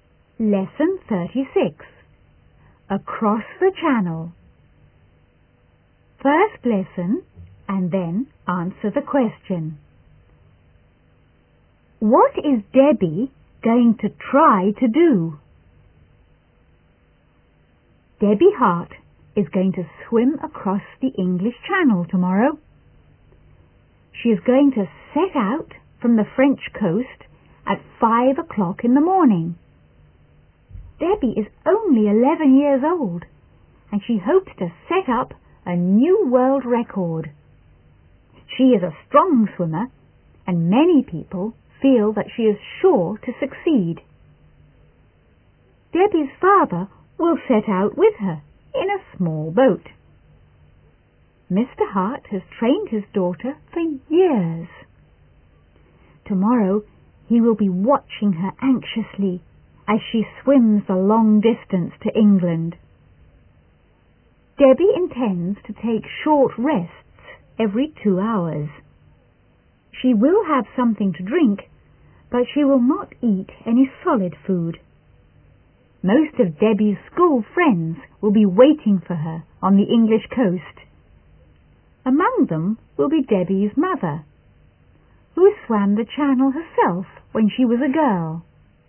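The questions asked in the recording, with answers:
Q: What is Debbie going to try to do?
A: Swim across the English Channel and set a new world record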